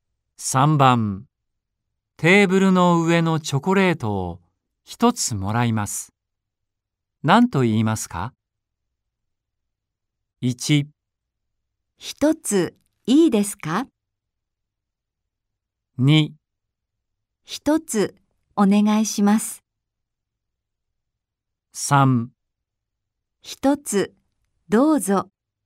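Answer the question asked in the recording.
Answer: 1: 一ついいですか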